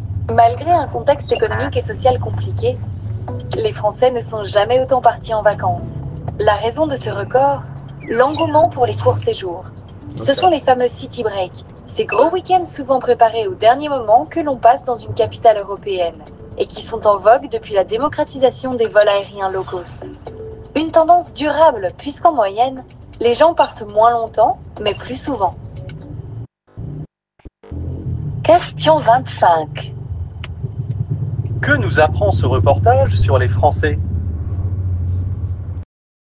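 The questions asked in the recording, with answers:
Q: Que nous apprend ce reportage sur les Français ?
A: Ils ne sont jamais autant partis en vacances, grâce aux courts séjours : ils partent moins longtemps mais plus souvent.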